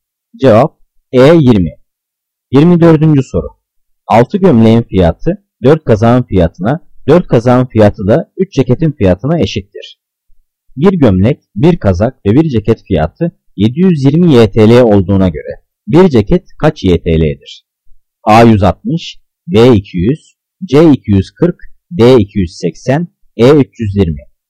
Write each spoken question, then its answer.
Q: Bir gömlek, bir kazak ve bir ceket fiyatı 720 YTL olduğuna göre bir ceket kaç YTL'dir?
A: Cevap E 320.